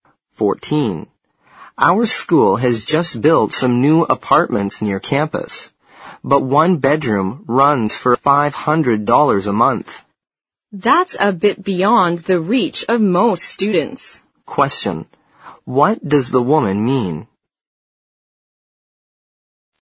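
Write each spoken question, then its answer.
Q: what does the woman mean?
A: Most students can't afford the new apartments.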